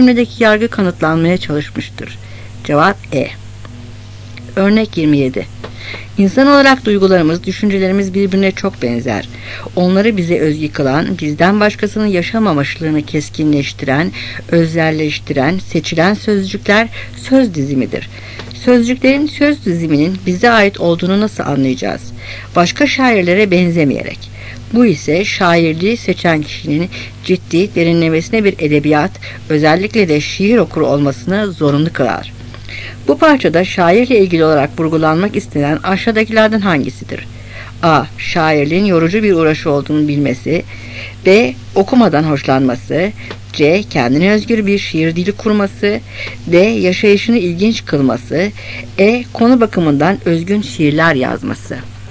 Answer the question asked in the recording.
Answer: Cevap C.